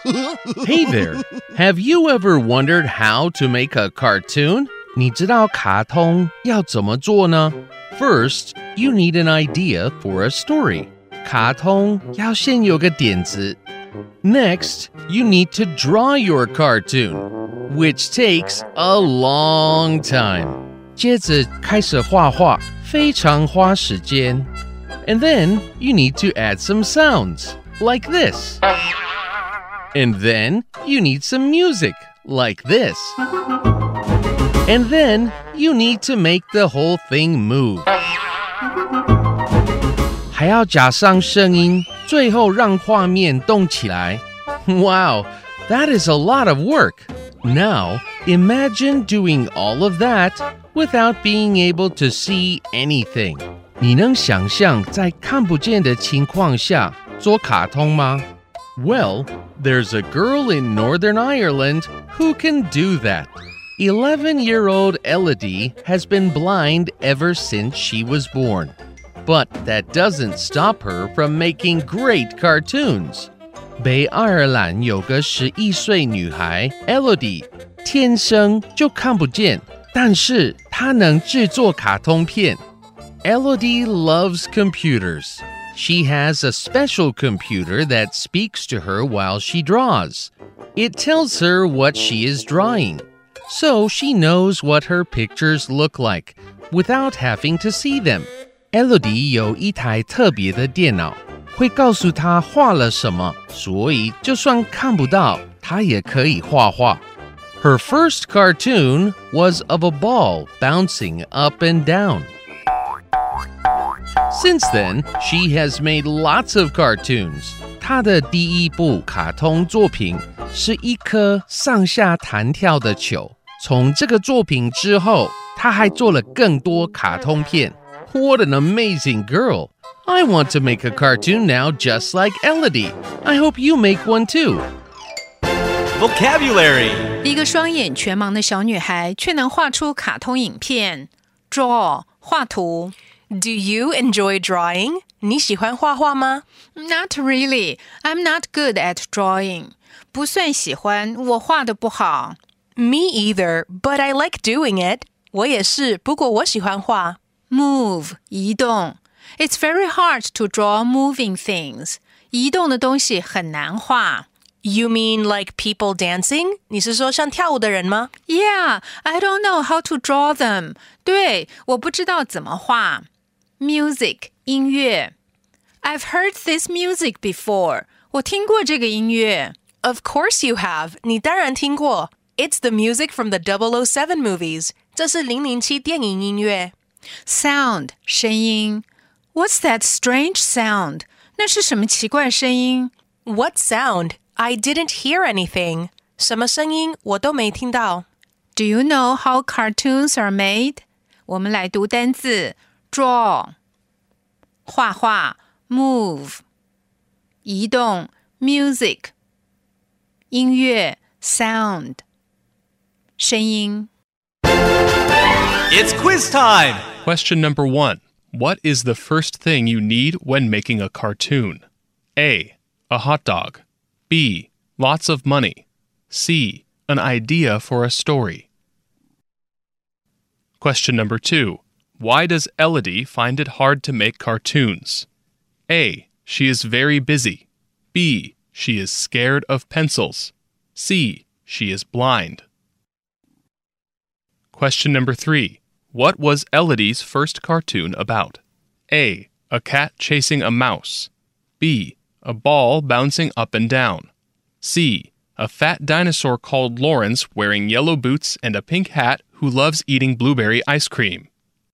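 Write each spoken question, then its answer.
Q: What is the first thing you need when making a cartoon?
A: C: An idea for a story.

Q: Why does Elodie find it hard to make cartoons?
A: C: She is blind.

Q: What was Elodie's first cartoon about?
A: B: A ball bouncing up and down.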